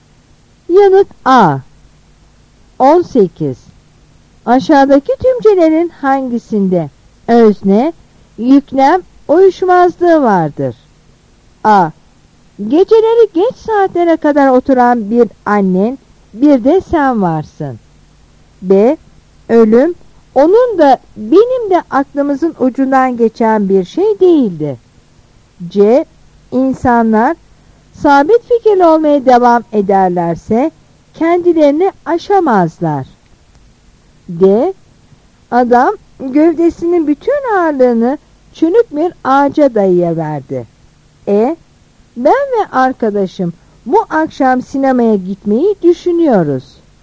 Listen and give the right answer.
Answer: Yanıt A.